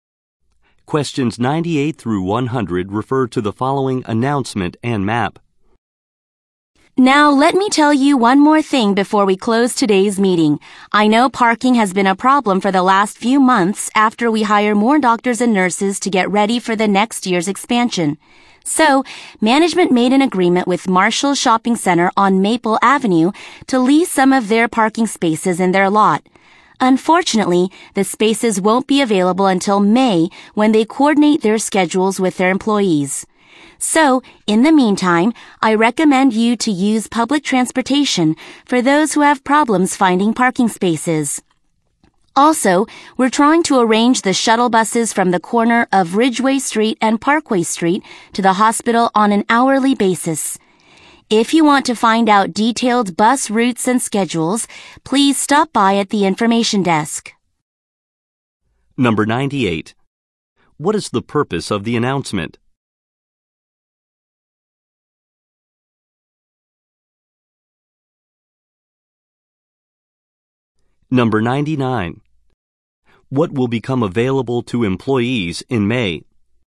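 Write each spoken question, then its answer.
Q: What is the purpose of the announcement?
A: To address the parking problem

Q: What will become available to employees in May?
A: Parking spaces at Marshall Shopping Center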